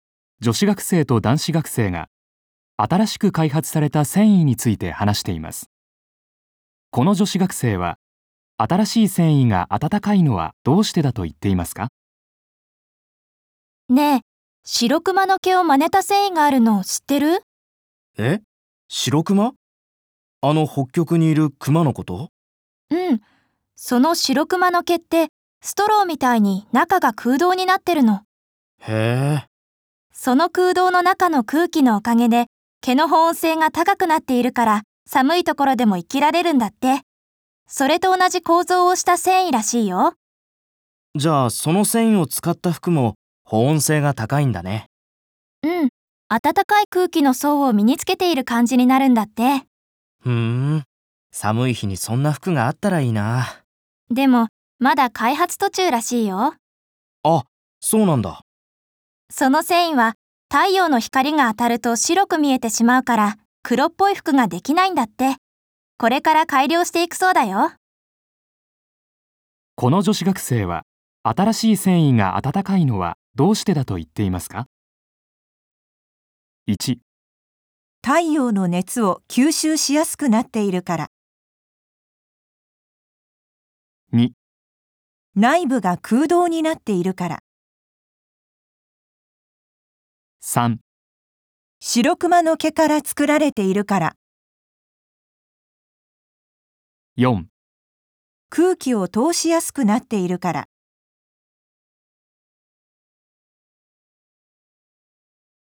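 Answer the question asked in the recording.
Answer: 2: 内部が空洞になっているから。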